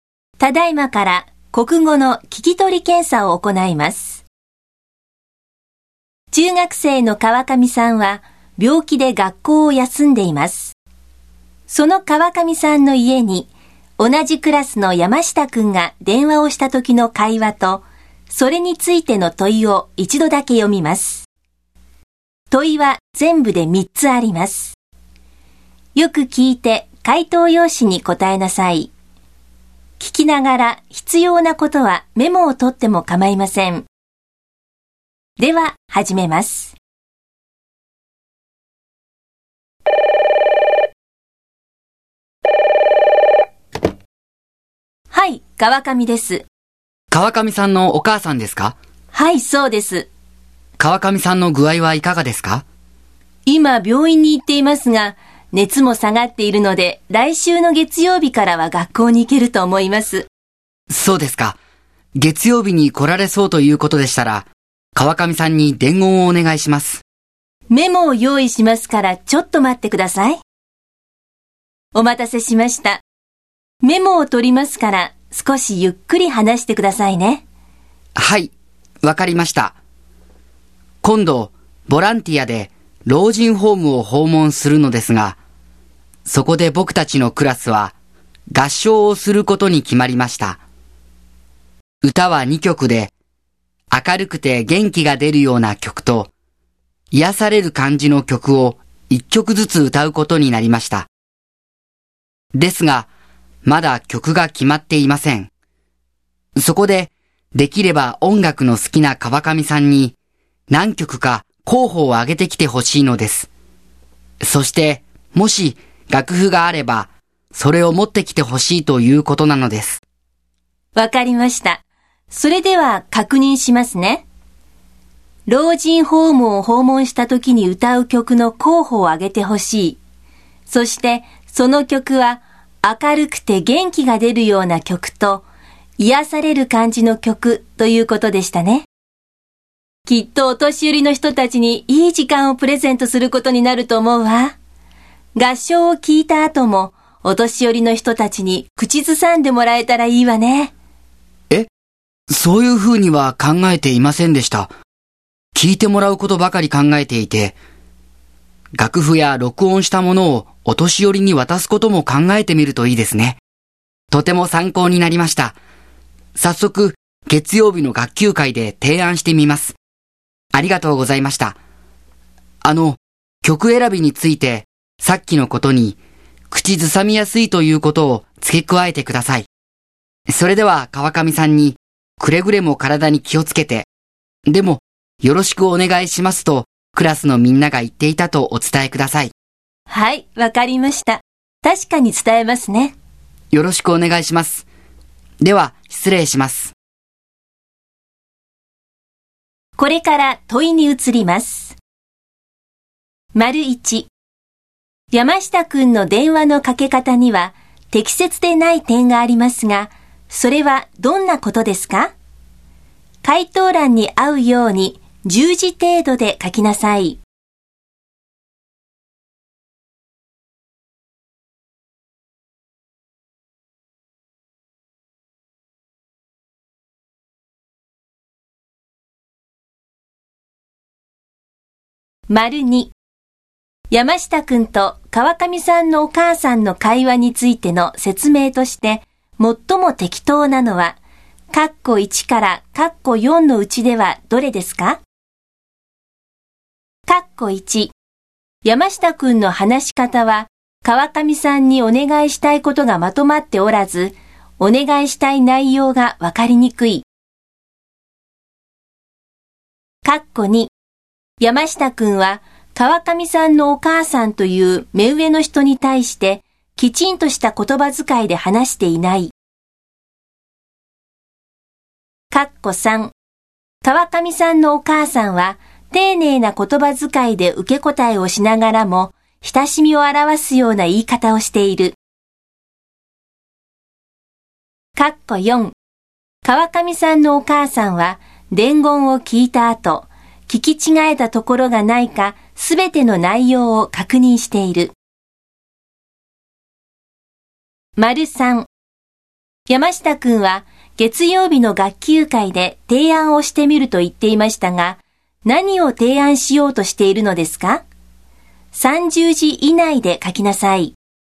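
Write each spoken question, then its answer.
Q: 山下くんの電話のかけ方には適切でない点がありますが、それはどんなことですか?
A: 自分の名前を名乗っていないこと

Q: 山下くんと川上さんのお母さんの会話についての説明として、最も適当なのは、括弧1から括弧4のうちではどれですか?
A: 3: 川上さんのお母さんは丁寧な言葉遣いで受け答えをしながらも親しみを表すような言い方をしている。

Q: 山下くんは月曜日の学級会で提案をしてみると言っていましたが、何を提案しようとしているのですか?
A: 合唱の後もお年寄りが口ずさめるよう、楽譜や録音したものを渡すこと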